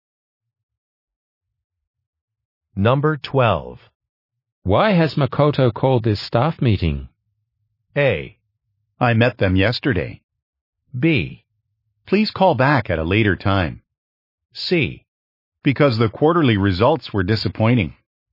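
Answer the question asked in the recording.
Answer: C: Because the quarterly results were disappointing.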